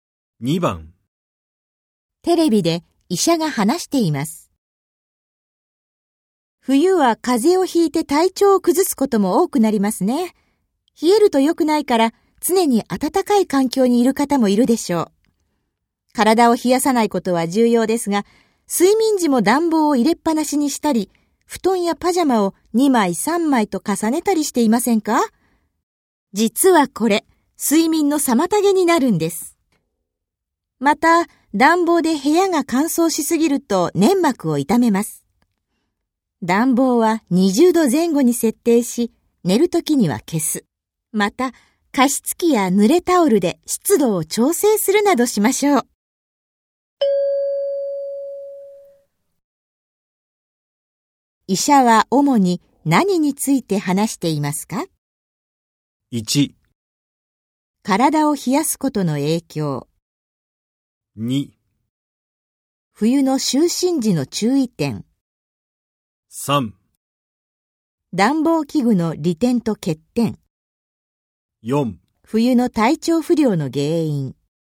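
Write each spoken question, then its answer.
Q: 医者は主に何について話していますか?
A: 2: 冬の就寝時の注意点。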